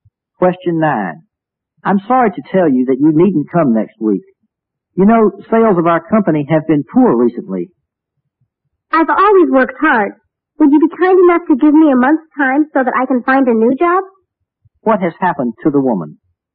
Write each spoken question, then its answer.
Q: What has happened to the woman?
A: 好,那么是被开除了